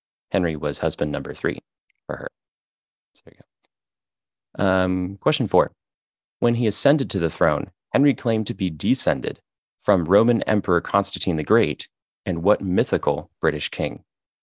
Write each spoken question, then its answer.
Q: When he ascended to the throne, Henry claimed to be descended from Roman Emperor Constantine the Great and what mythical British king?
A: Yeah, he claimed to be descended from King Arthur.